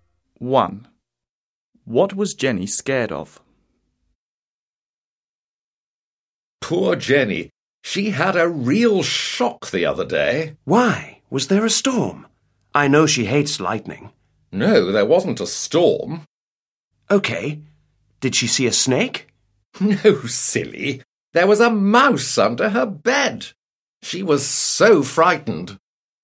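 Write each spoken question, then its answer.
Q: What was Jenny scared of?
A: a mouse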